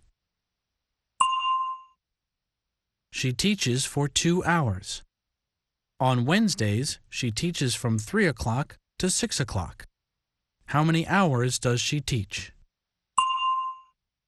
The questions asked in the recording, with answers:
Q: How many hours does she teach?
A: She teaches for 3 hours.